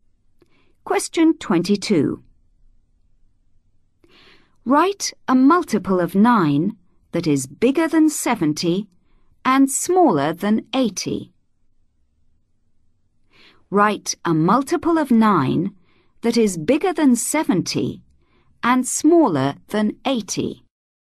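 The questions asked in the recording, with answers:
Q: Write a multiple of 9 that is bigger than 70 and smaller than 80.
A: 72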